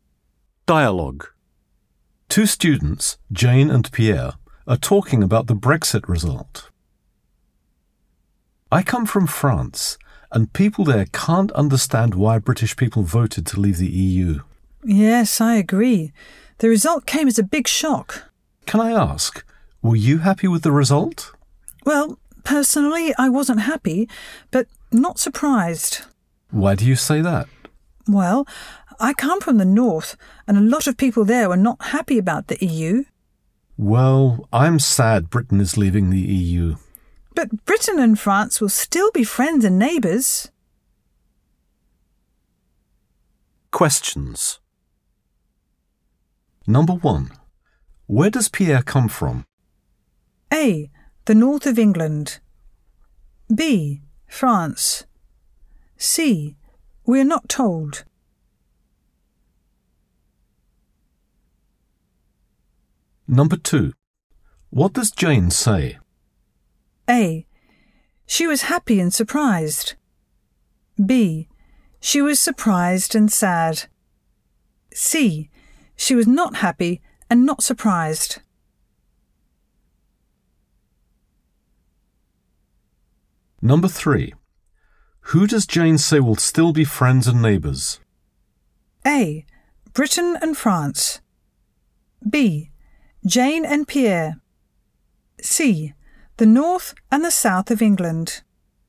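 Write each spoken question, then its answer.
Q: Where does Pierre come from?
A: B: France

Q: What does Jane say?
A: C: She was not happy and not surprised.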